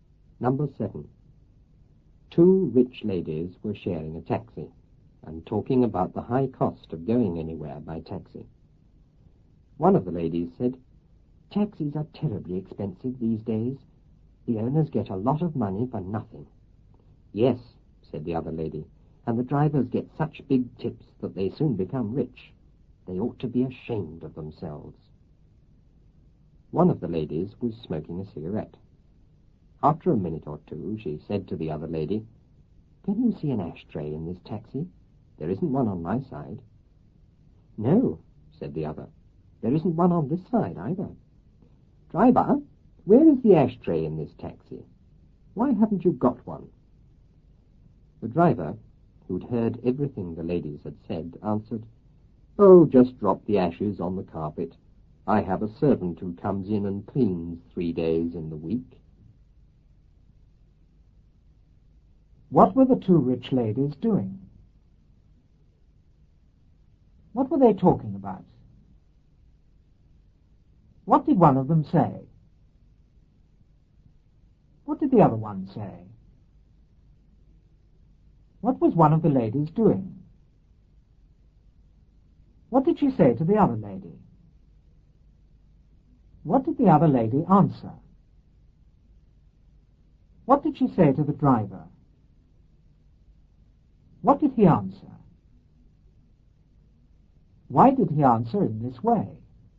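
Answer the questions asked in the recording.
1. Sharing a taxi
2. The high cost of going anywhere by taxi
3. Taxis are terribly expensive these days; the owners get a lot of money for nothing
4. The drivers get such big tips that they soon become rich; they ought to be ashamed of themselves
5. Smoking a cigarette
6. Can you see an ashtray in this taxi? There isn't one on my side
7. No, there isn't one on this side either
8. Driver, where is the ashtray in this taxi? Why haven't you got one?
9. Just drop the ashes on the carpet; I have a servant who comes in and cleans 3 days a week
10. Because he had heard them say taxi drivers get rich, so he was mocking them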